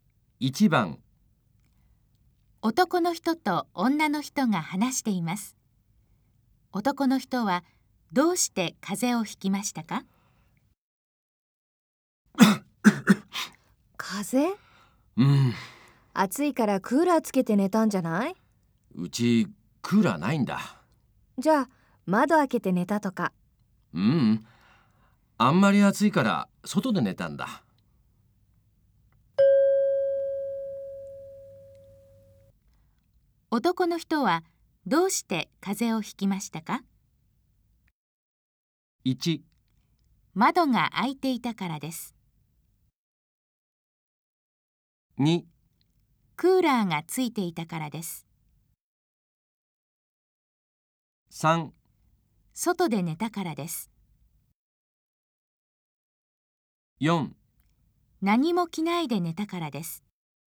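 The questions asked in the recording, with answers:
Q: 男の人はどうして風邪をひきましたか?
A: 3: 外で寝たからです。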